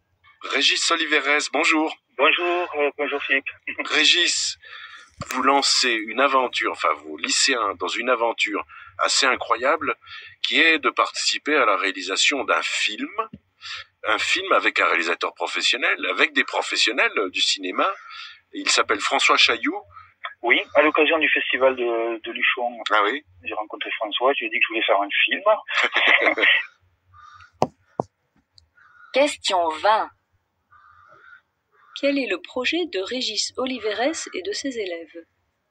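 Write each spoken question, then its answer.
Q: Quel est le projet de Régis Oliveres et de ses élèves ?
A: Participer à la réalisation d'un film avec un réalisateur professionnel (François Chailloux)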